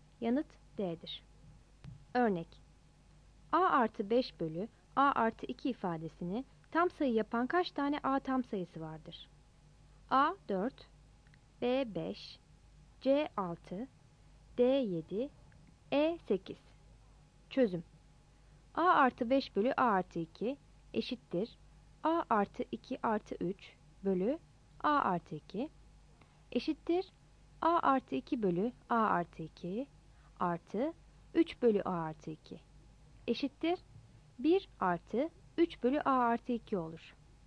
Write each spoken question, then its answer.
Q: Örnek: A artı 5 bölü A artı 2 ifadesini tam sayı yapan kaç tane A tam sayısı vardır?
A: Yanıt A'dır.